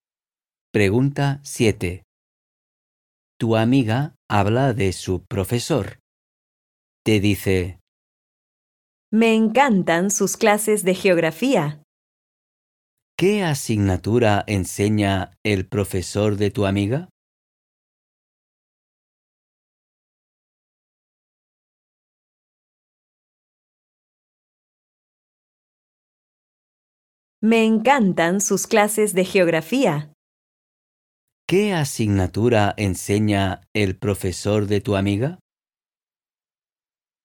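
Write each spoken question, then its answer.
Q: ¿Qué asignatura enseña el profesor de tu amiga?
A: Geografía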